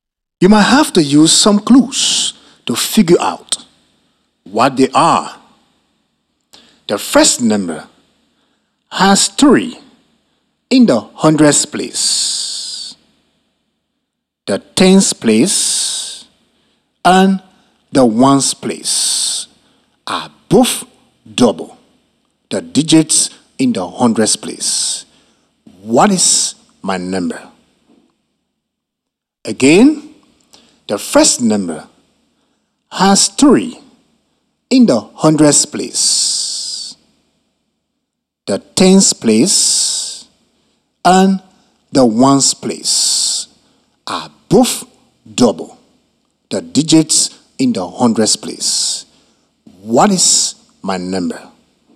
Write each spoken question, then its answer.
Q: What is my number?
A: That's right. My first number is 366.